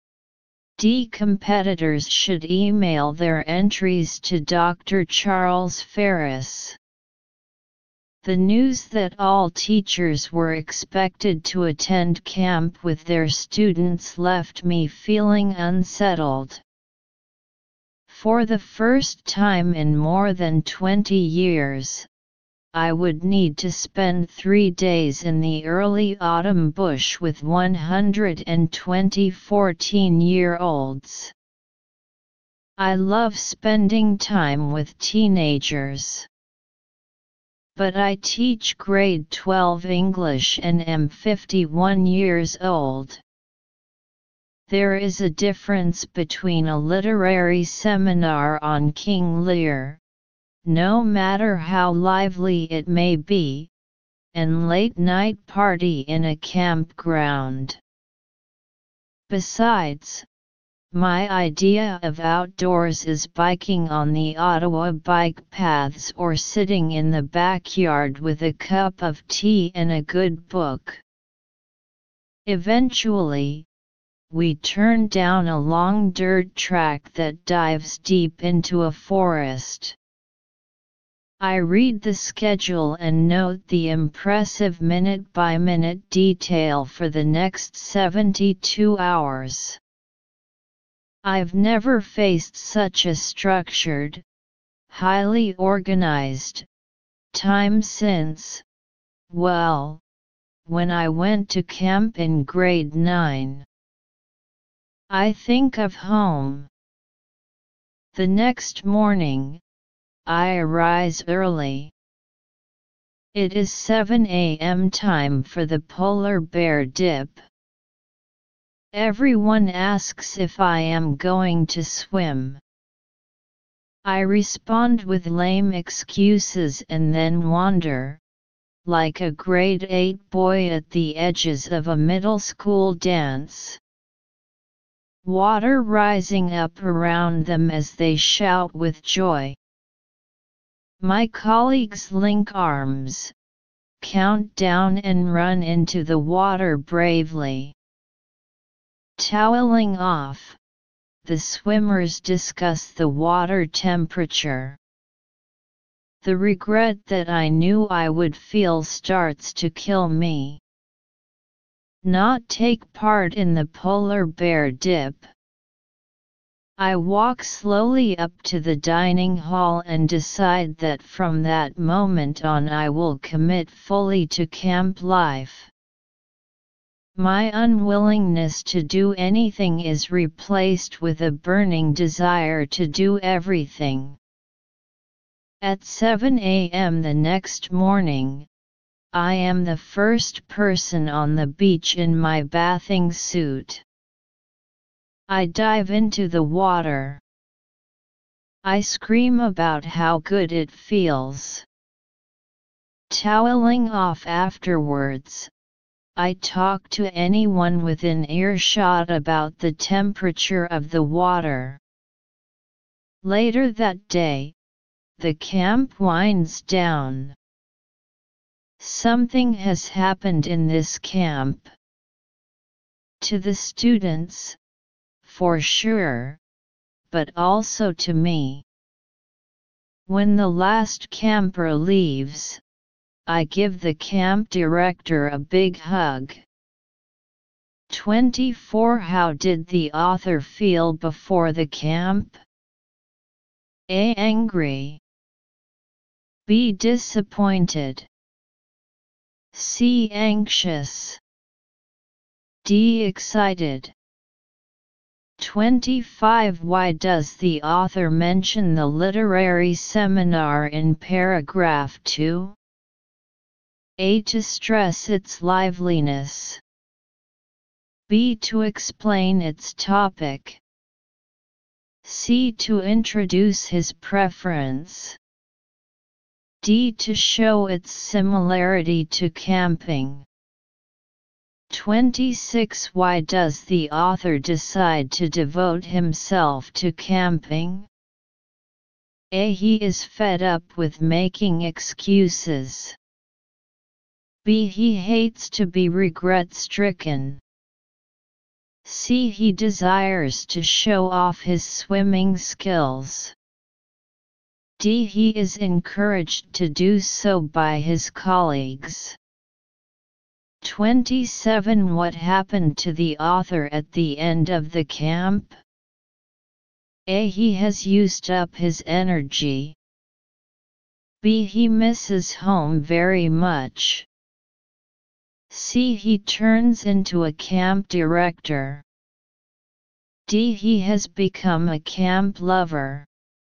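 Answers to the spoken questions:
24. C: Anxious.
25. C: To introduce his preference.
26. B: He hates to be regret-stricken.
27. D: He has become a camp lover.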